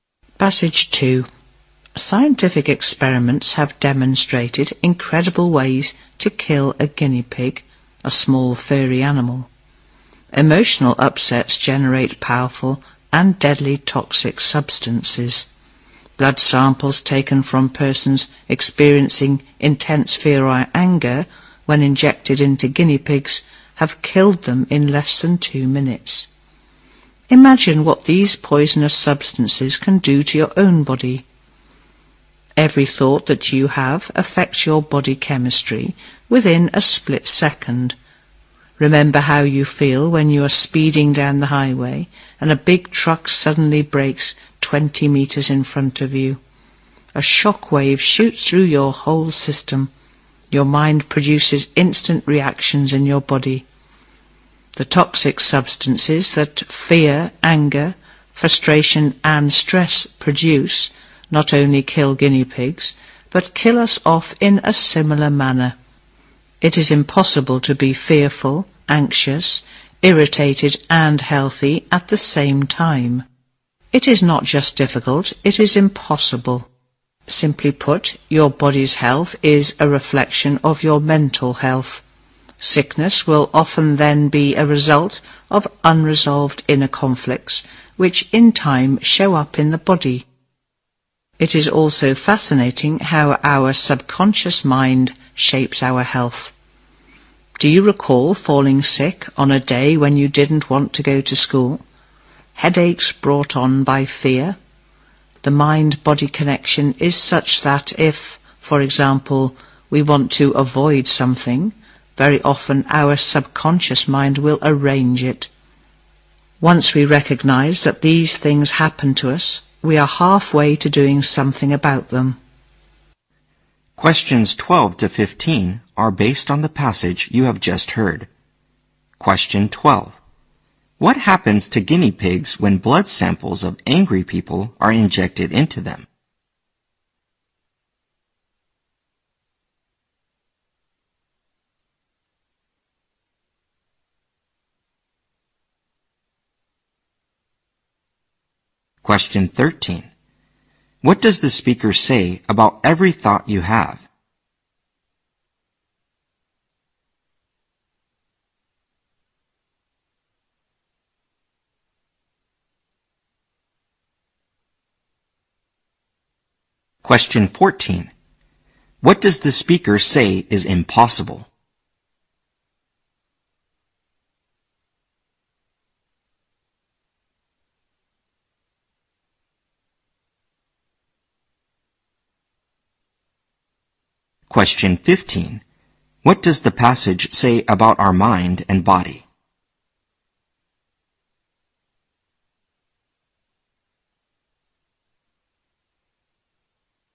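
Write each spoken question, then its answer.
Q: What happens to guinea pigs when blood samples of angry people are injected into them?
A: They die in less than 2 minutes

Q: What does the speaker say about every thought you have?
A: It affects your body chemistry within a split second

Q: What does the speaker say is impossible?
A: To be fearful, anxious, irritated and healthy at the same time

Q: What does the passage say about our mind and body?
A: The body's health reflects mental health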